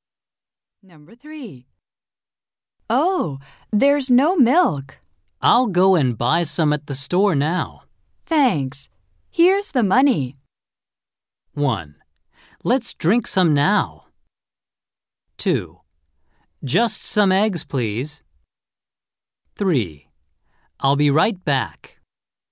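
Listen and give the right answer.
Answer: 3: I'll be right back.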